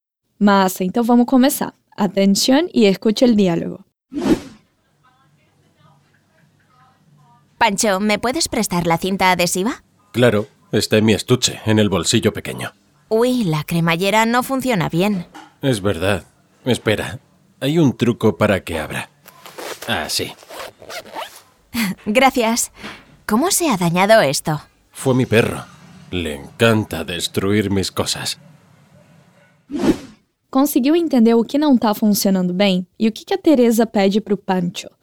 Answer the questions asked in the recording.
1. la cremallera no funciona bien
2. Perguntando para o Pancho se ele pode emprestar a fita adesiva.